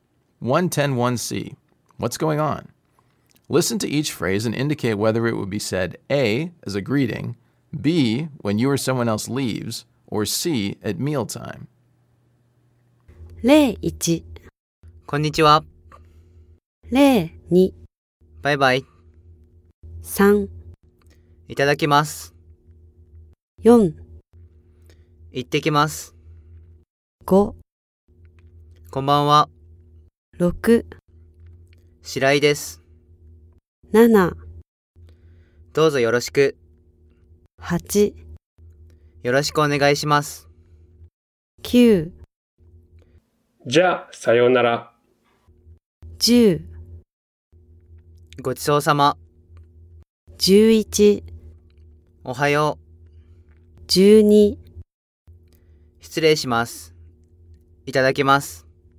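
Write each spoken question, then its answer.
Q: こんにちは.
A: A: as a greeting

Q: バイバイ.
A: B: when you or someone else leaves

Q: いただきます.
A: C: at mealtime

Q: 行ってきます.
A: B: when you or someone else leaves

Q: こんばんは.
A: A: as a greeting

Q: どうぞよろしく.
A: A: as a greeting

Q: よろしくお願いします.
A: A: as a greeting

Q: じゃあさようなら.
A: B: when you or someone else leaves

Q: ごちそうさま.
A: C: at mealtime

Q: おはよう.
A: A: as a greeting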